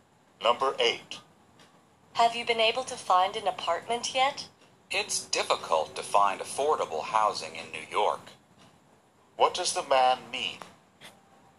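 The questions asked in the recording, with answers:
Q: What does the man mean?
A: He hasn't found an apartment because housing in New York is expensive.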